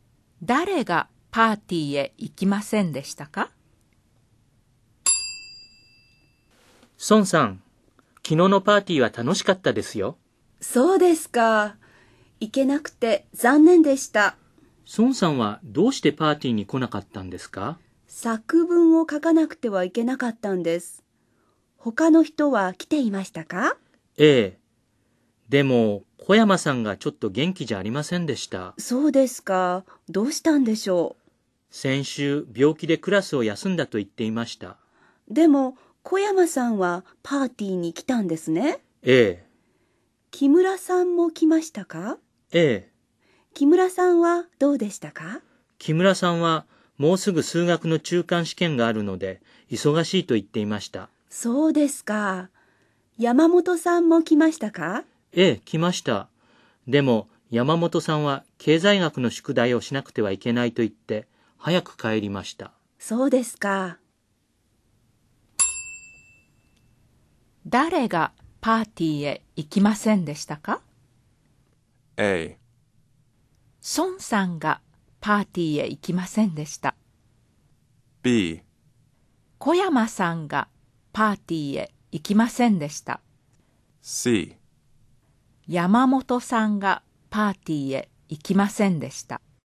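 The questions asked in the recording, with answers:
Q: 誰がパーティーへ行きませんでしたか?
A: A: 孫さんがパーティーへ行きませんでした。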